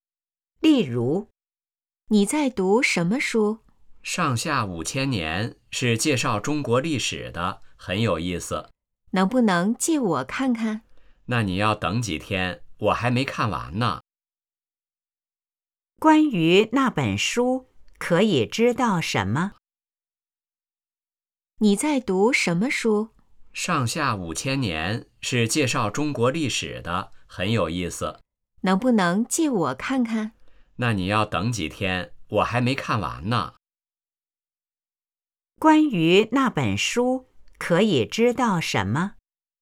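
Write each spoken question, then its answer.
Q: 关于那本书,可以知道什么?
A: 是介绍中国历史的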